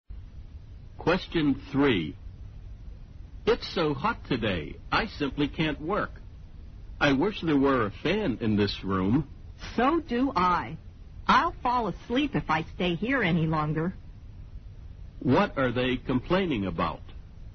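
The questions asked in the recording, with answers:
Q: What are they complaining about?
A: The heat: it's too hot and there's no fan in the room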